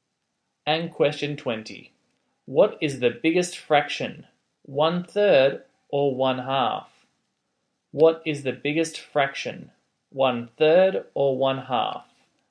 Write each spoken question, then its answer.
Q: What is the biggest fraction, 1/3 or 1/2?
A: the biggest fraction there is 1/2.